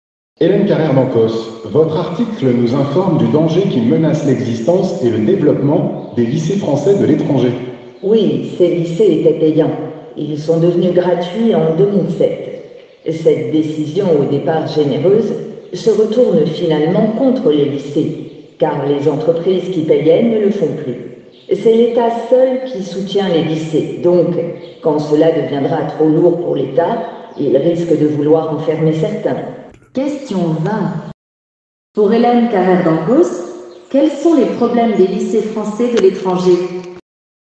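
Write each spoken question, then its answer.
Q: Pour Hélène Carrère-Dancos, quels sont les problèmes des lycées français de l'étranger ?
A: Devenus gratuits en 2007, ils ne sont plus financés par les entreprises ; seul l'État les soutient et il risque d'en fermer certains.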